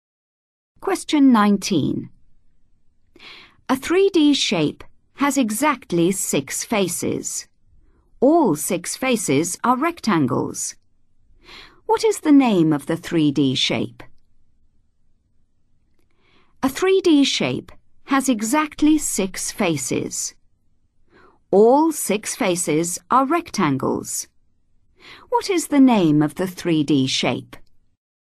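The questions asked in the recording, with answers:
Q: What is the name of the 3D shape?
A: cuboid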